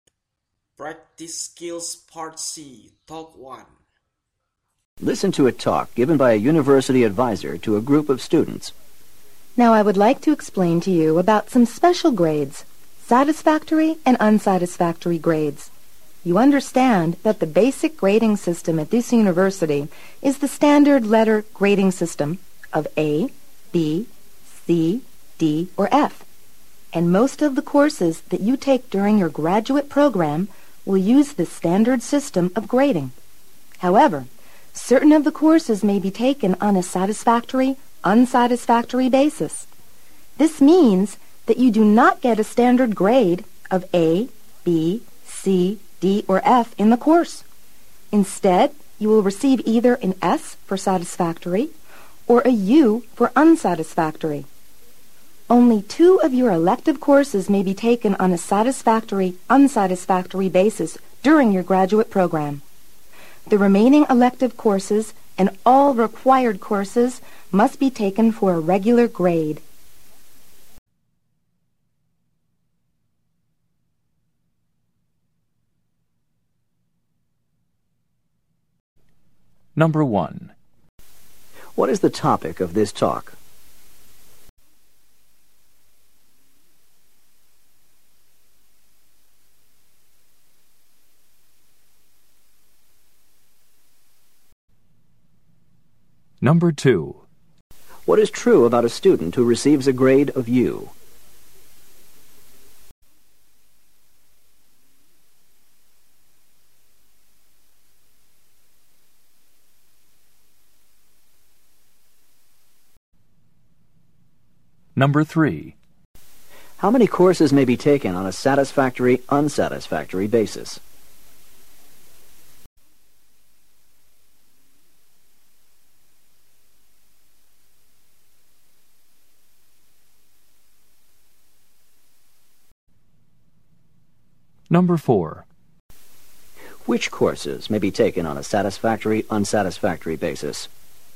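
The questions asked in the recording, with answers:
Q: What is the topic of this talk?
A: Satisfactory and unsatisfactory grades

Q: How many courses may be taken on a satisfactory, unsatisfactory basis?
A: Two

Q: Which courses may be taken on a satisfactory, unsatisfactory basis?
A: Elective courses (only two)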